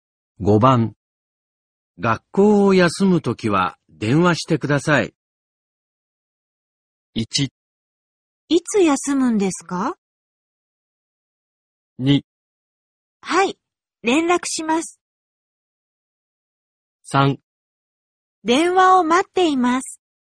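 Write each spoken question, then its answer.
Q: 学校を休むときは電話してください。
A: 2: はい、連絡します。

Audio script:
1
いつ休むんですか。
2
はい、連絡します。
3
電話を待っています。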